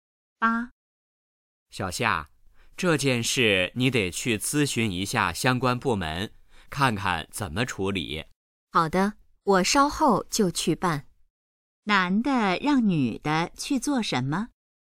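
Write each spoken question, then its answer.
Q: 男的让女的去做什么?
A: 去咨询相关部门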